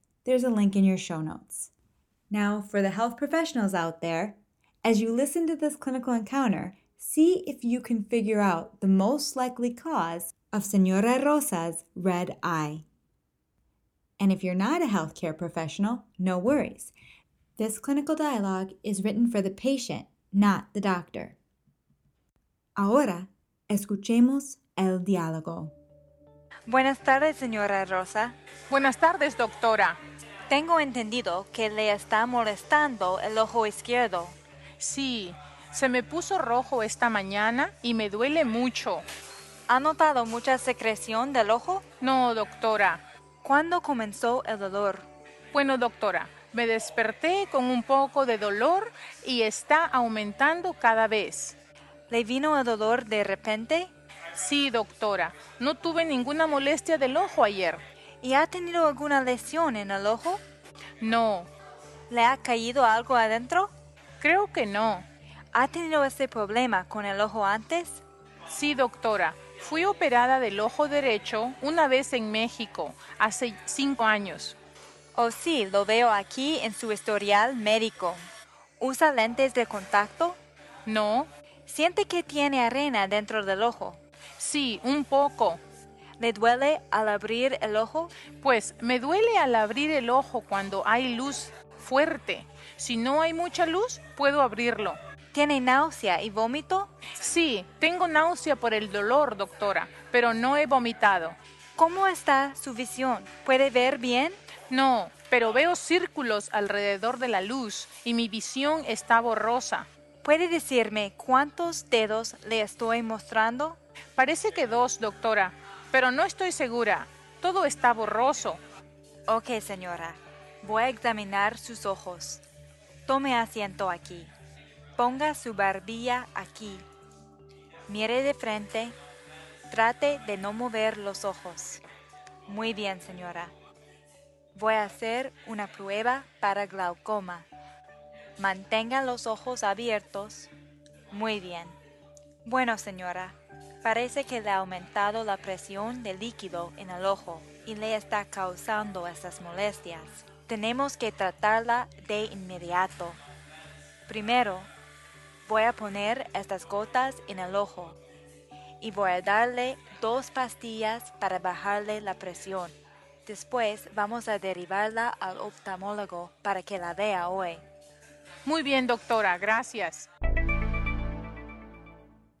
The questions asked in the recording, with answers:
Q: see if you can figure out the most likely cause of Señora Rosa's red eye.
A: Acute angle closure glaucoma.